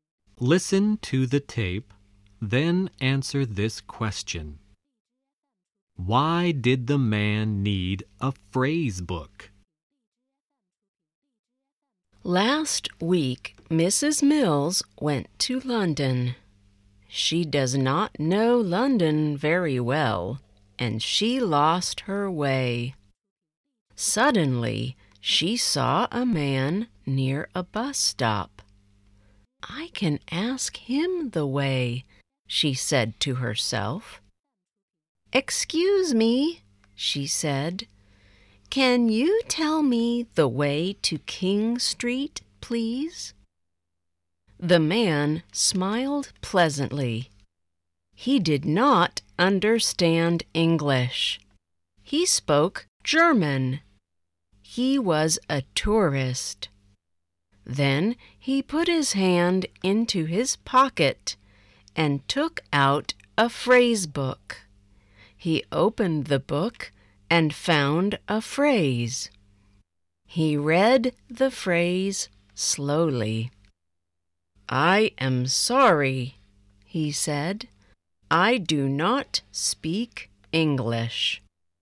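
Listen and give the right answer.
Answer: Because he did not speak English; he was a German tourist.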